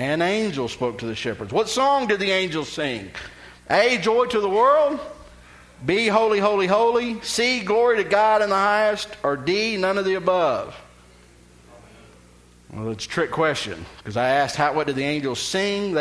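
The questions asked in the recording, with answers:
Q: What song did the angels sing?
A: D: none of the above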